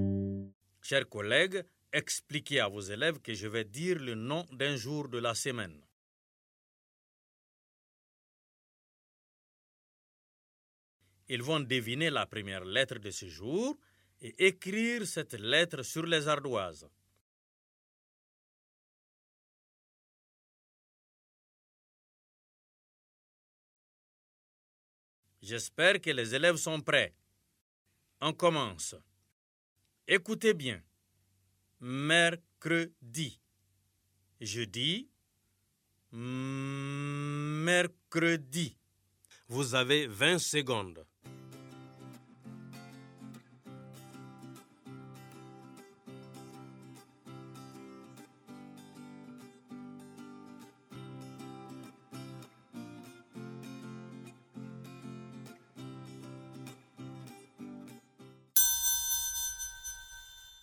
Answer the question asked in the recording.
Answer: J'espère que vous avez écrit la lettre M sur les ardoises.